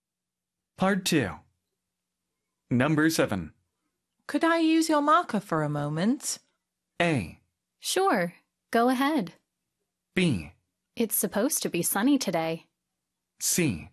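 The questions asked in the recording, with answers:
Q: Could I use your marker for a moment?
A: A: Sure. Go ahead.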